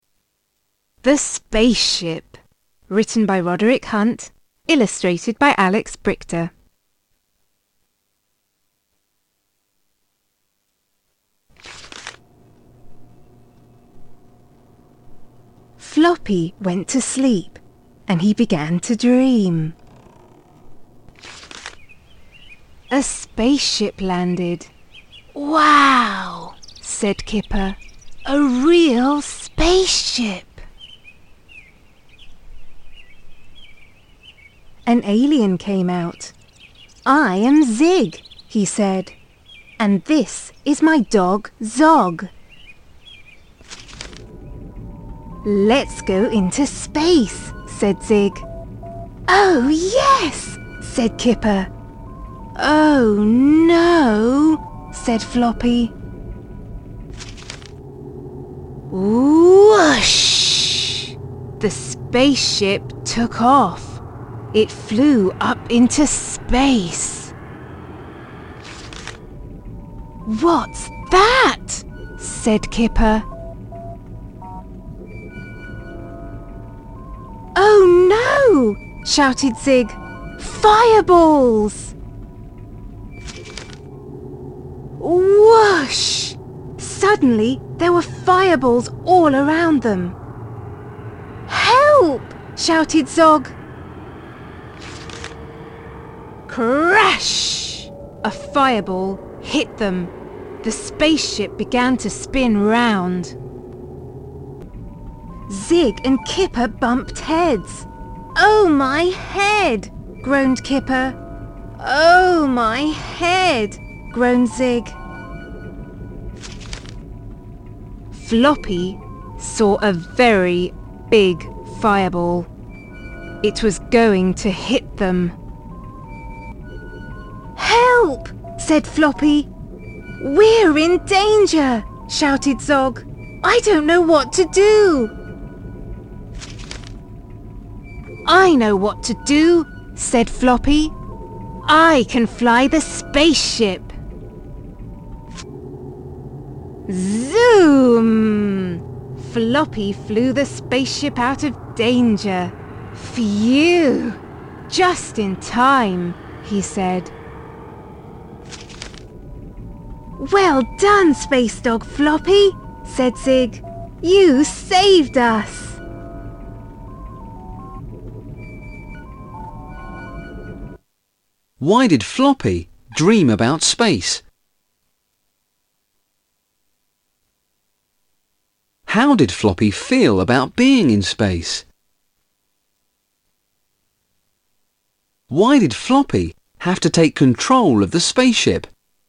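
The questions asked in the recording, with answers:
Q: Why did Floppy have to take control of the spaceship?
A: Zig and Kipper had bumped heads, and a very big fireball was about to hit them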